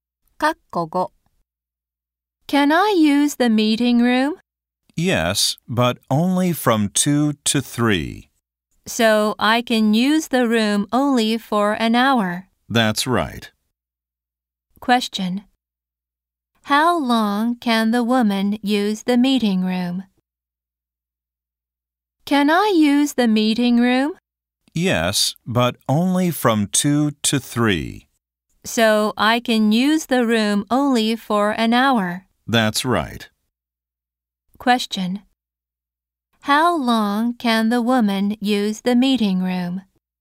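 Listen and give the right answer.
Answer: For one hour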